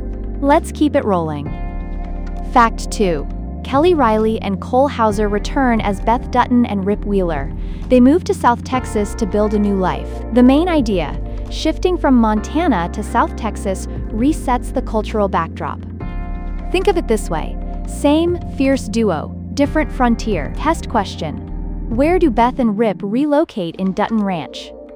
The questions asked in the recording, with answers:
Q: Where do Beth and Rip relocate in Dutton Ranch?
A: Correct answer, South Texas.